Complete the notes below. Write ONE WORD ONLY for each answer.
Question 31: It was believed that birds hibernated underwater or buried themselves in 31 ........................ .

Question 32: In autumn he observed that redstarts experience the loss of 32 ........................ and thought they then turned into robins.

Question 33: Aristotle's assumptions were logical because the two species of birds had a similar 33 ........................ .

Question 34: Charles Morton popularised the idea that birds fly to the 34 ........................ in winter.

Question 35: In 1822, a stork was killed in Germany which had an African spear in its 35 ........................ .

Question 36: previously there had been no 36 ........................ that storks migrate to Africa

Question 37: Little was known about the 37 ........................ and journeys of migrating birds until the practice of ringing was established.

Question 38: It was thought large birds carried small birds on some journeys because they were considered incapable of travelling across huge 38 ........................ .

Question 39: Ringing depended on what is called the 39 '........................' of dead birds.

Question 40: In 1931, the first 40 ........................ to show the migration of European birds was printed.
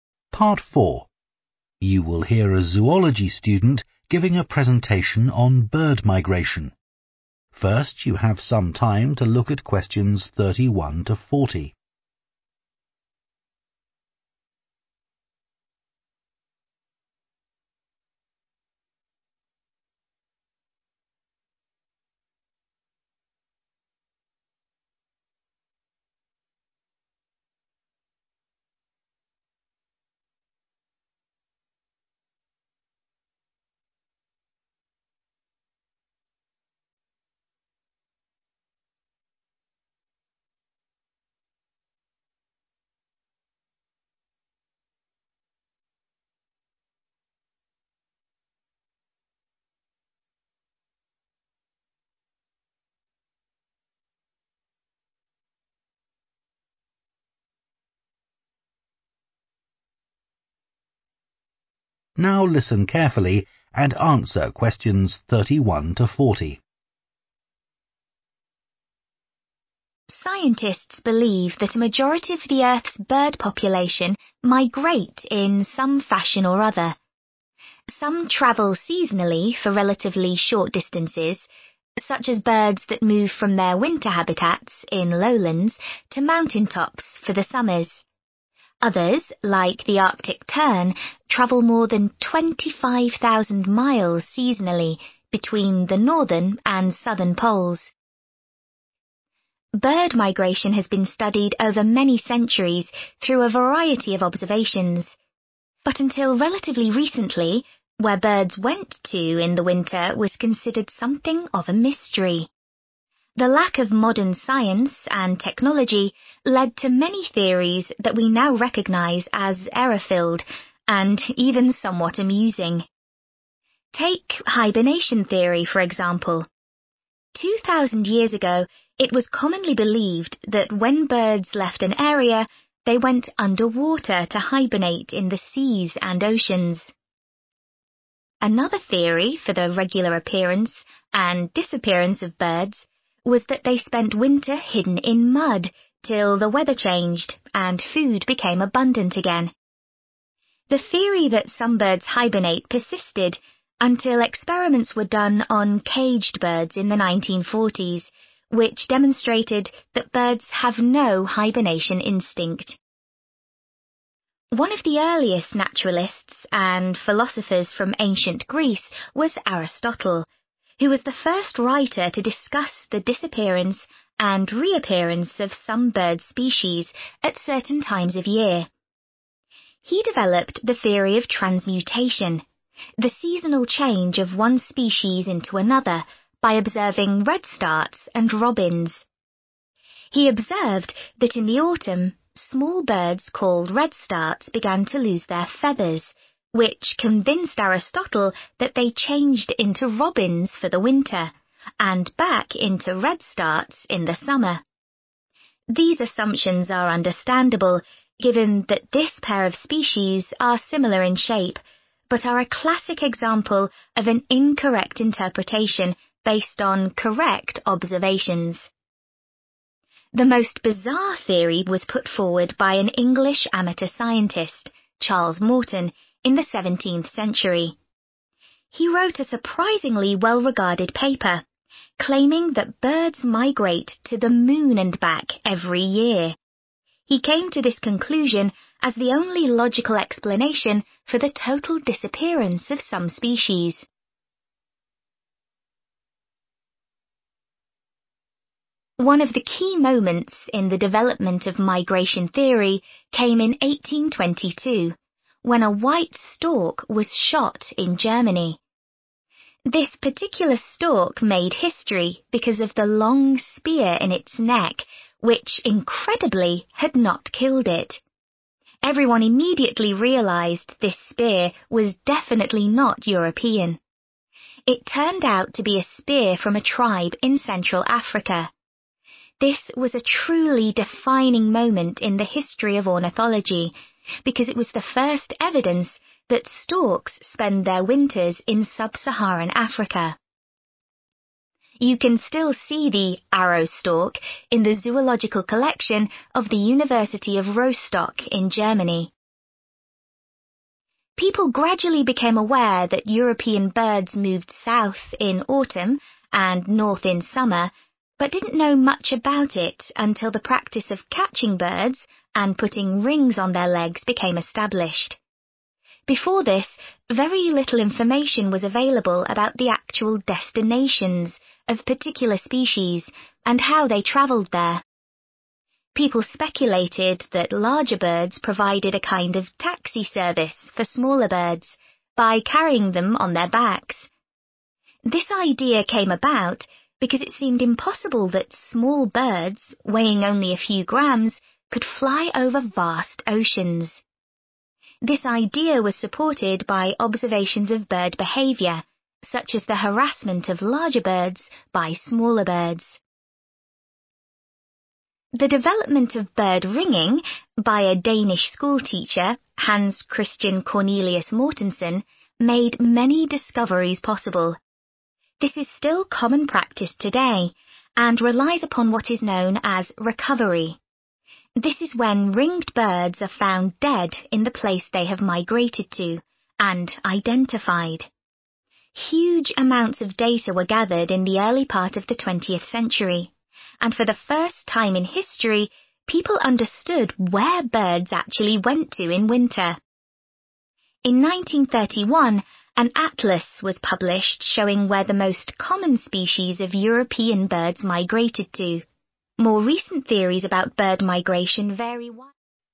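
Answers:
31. mud
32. feathers
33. shape
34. moon
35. neck
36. evidence
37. destinations
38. oceans
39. recovery
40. atlas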